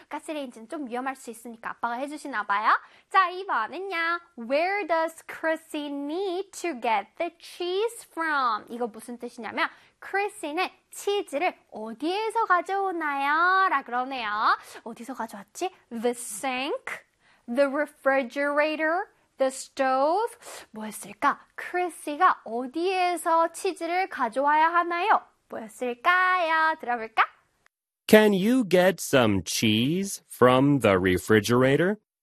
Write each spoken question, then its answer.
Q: Where does Chrissy need to get the cheese from?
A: 그래서 정답은? The refrigerator예요.